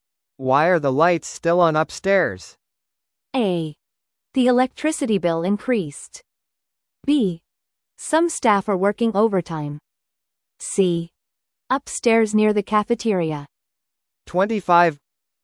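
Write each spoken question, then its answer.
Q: Why are the lights still on upstairs?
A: B: Some staff are working overtime.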